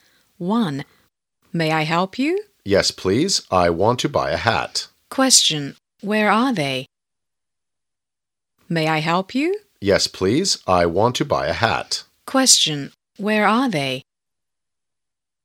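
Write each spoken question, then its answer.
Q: Where are they?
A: In a shop (a hat shop)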